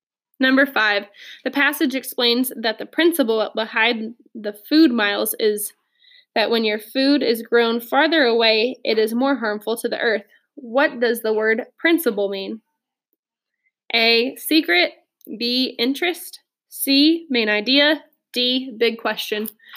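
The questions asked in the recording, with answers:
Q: What does the word principle mean?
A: C: Main idea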